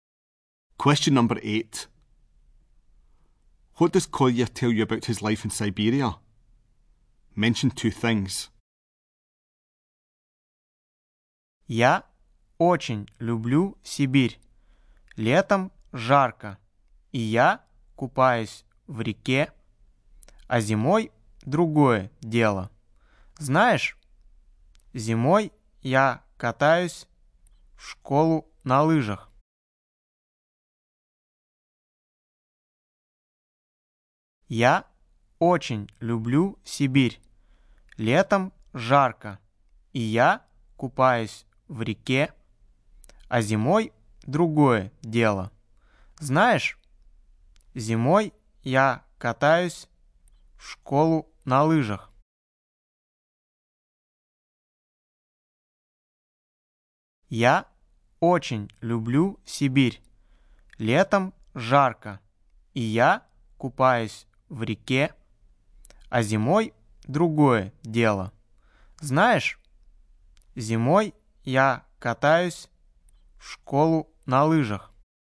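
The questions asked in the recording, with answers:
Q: What does Kolya tell you about his life in Siberia?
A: It is hot in summer and he swims in the river; in winter he skis to school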